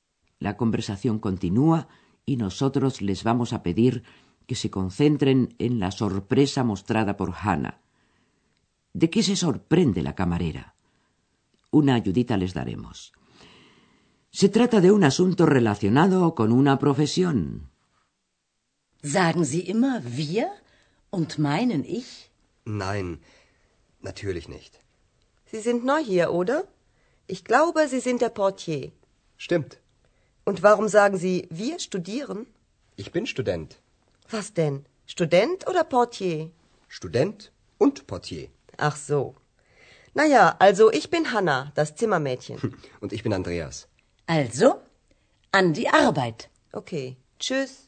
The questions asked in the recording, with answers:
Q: ¿De qué se sorprende la camarera?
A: Hannah se asombra de que Andreas diga que es estudiante, siendo así que muy poco antes le asegura que es el recepcionista del Hotel Europa.